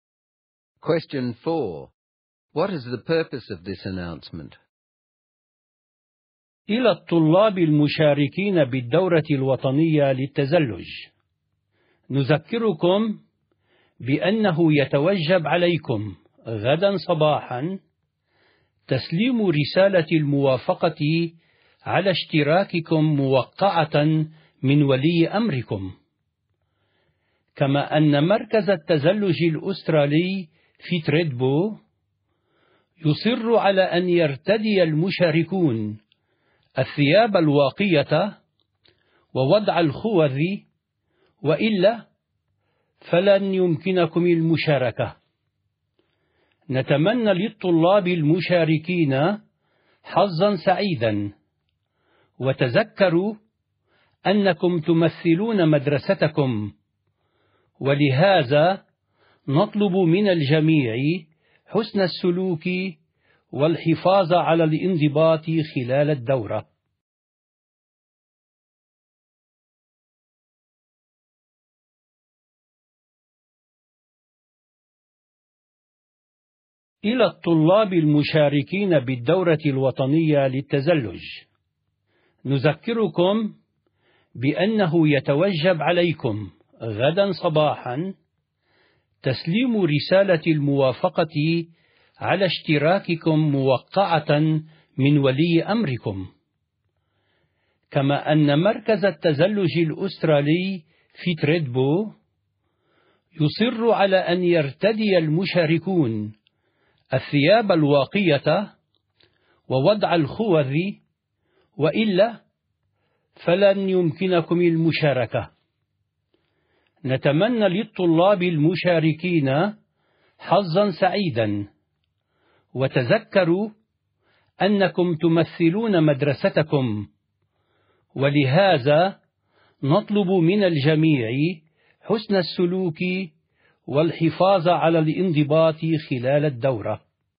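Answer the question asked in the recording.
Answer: To remind students in the national ski course to hand in signed consent forms tomorrow, wear protective clothing and helmets, and behave well as they represent the school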